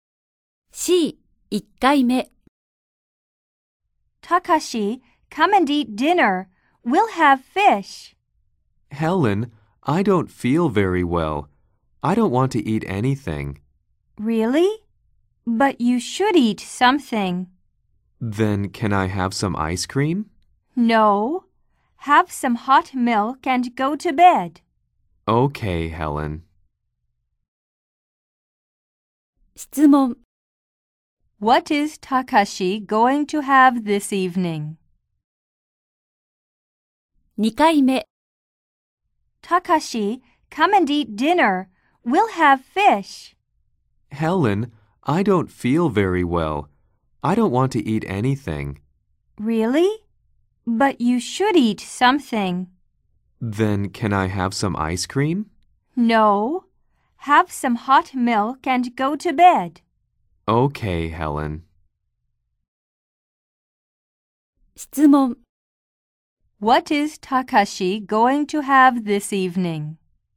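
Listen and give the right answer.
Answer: Some hot milk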